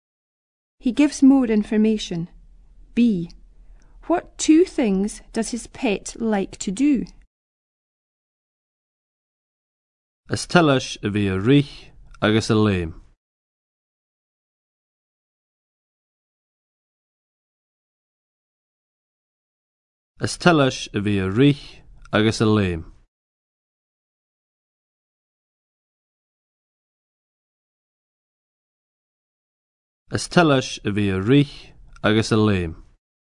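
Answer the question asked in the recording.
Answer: Run and jump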